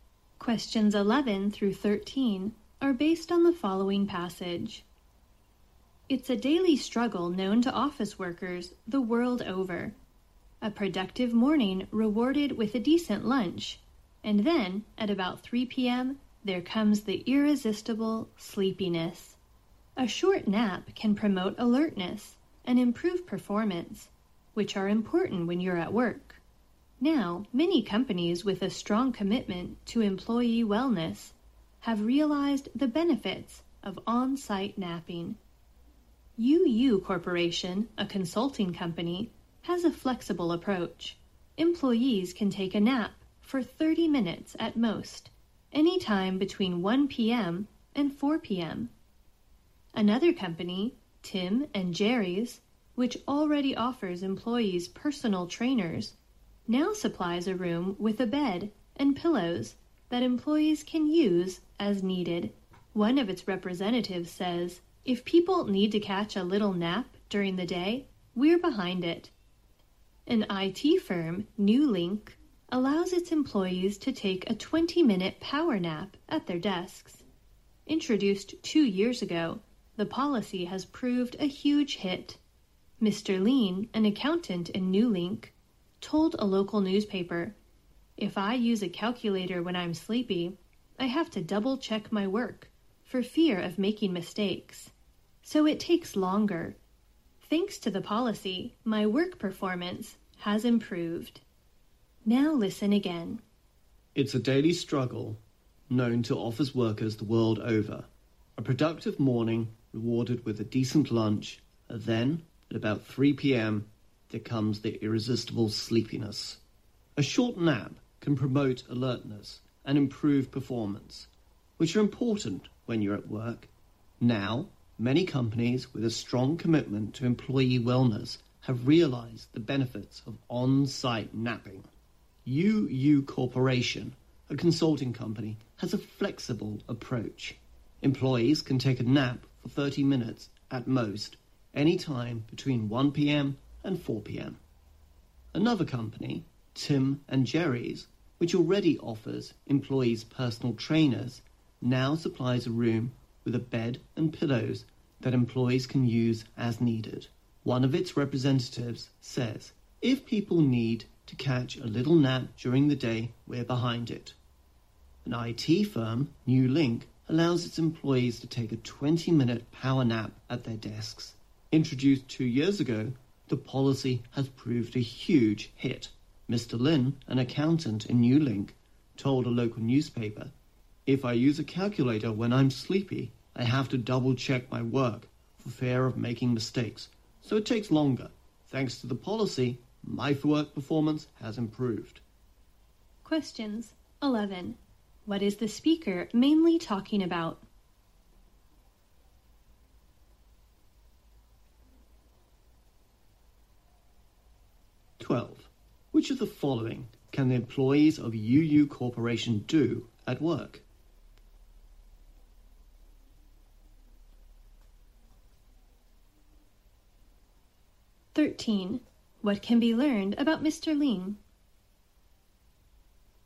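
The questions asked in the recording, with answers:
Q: What is the speaker mainly talking about?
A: Napping at work

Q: Which of the following can the employees of UU Corporation do at work?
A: Take a nap of up to 30 minutes between 1 p.m. and 4 p.m.

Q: What can be learned about Mr.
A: His work performance has improved because of the nap policy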